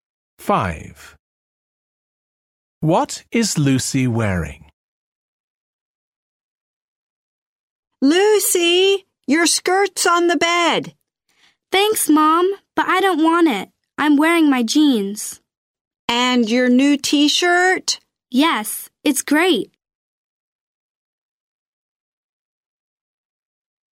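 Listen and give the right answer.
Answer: Jeans and her new T-shirt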